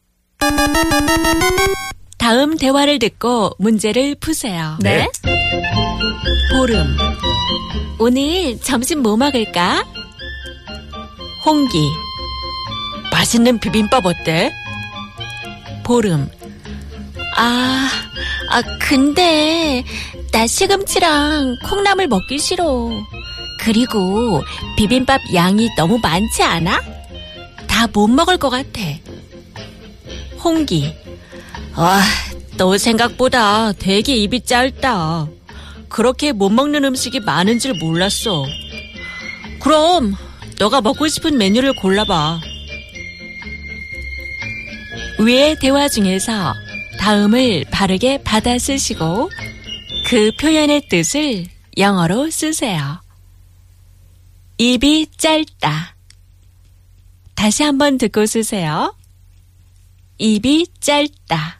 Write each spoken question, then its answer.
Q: 위의 대화 중에서 다음을 바르게 받아 쓰시고 그 표현의 뜻을 영어로 쓰세요. 입이 짧다.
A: It means to have a small appetite or to eat like a bird.